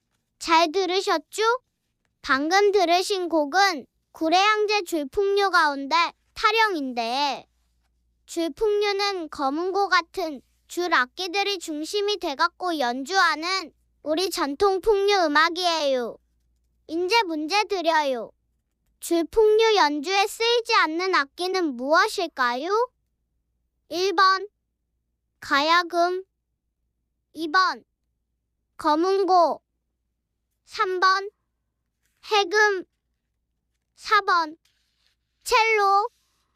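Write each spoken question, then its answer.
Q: 줄풍류 연주에 쓰이지 않는 악기는 무엇일까요?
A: 4: 첼로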